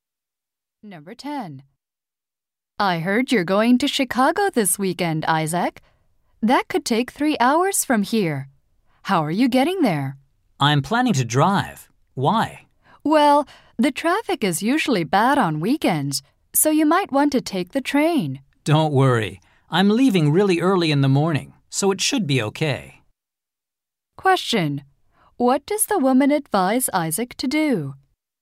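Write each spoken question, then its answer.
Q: What does the woman advise Isaac to do?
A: Take the train.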